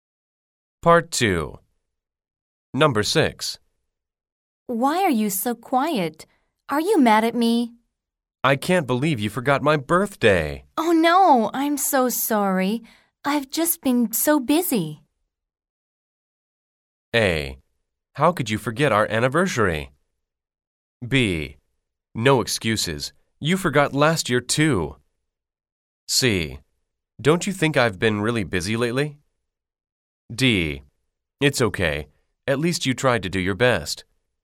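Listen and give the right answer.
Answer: B: No excuses. You forgot last year too.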